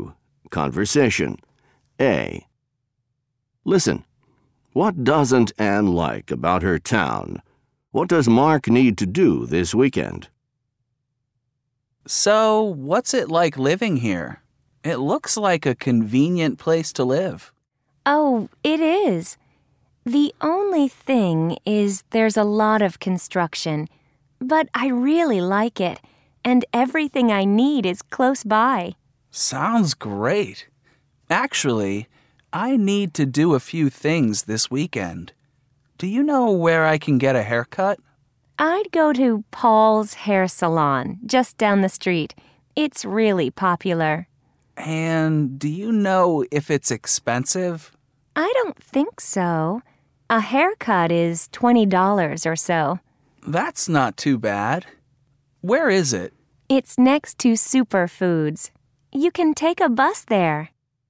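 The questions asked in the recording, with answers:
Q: What doesn't Anne like about her town?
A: There's a lot of construction

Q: What does Mark need to do this weekend?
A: Get a haircut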